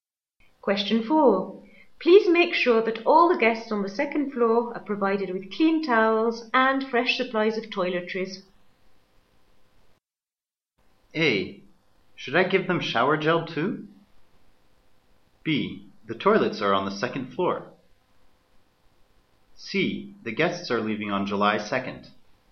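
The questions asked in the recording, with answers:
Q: Please make sure that all the guests on the second floor are provided with clean towels and fresh supplies of toiletries.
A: A: Should I give them shower gel too?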